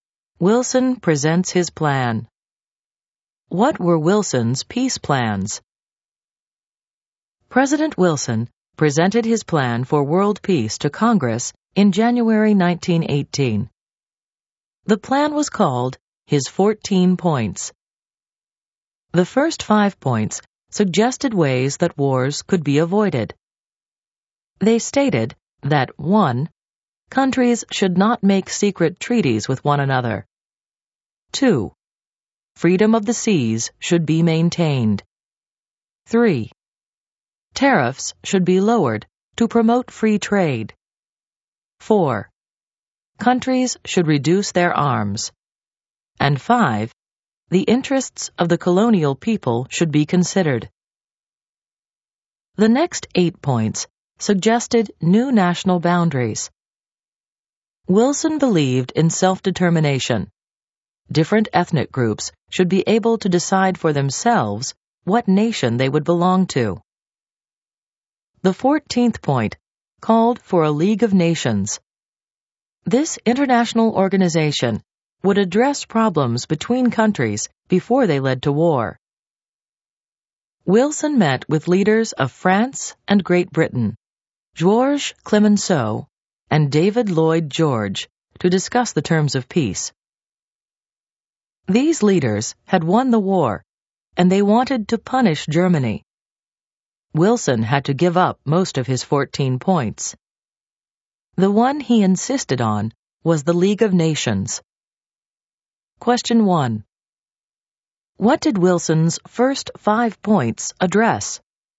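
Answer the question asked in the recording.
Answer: Ways to avoid wars: no secret treaties, freedom of the seas, lower tariffs, arms reduction, colonial interests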